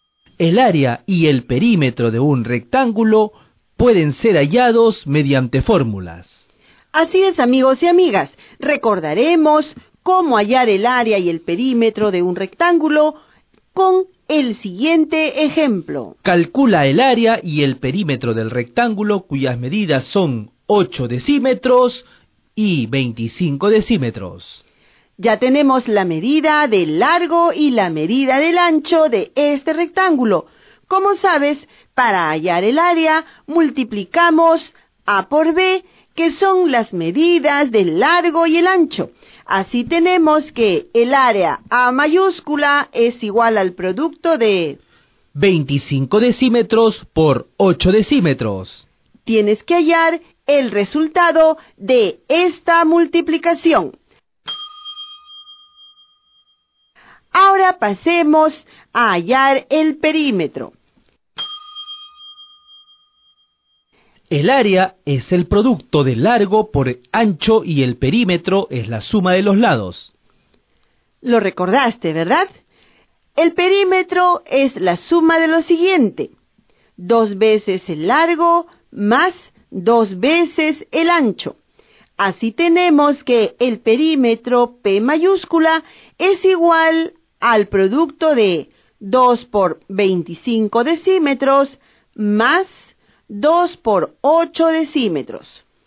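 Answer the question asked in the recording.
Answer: Área 200 dm2, perímetro 66 dm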